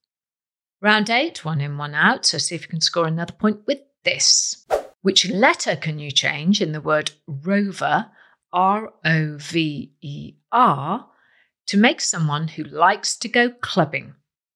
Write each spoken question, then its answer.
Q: Which letter can you change in the word rover, R-O-V-E-R, to make someone who likes to go clubbing?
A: Well, change the letter O to a letter A, and you have got yourself a raver, R-A-V-E-R.